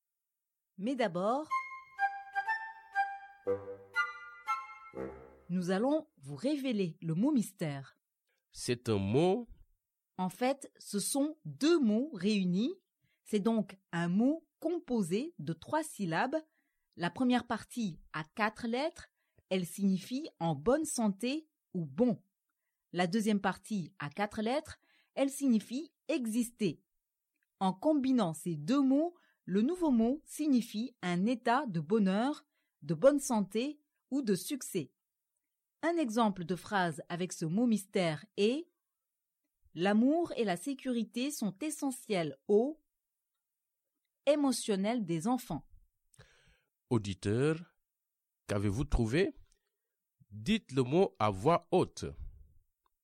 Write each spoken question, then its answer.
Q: Auditeur, qu'avez-vous trouvé?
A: Le mot mystère d'aujourd'hui est « bien-être ».